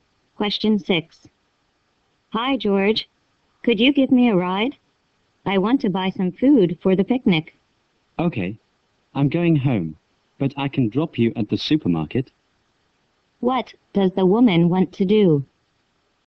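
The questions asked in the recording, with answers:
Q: What does the woman want to do?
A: Buy some food for the picnic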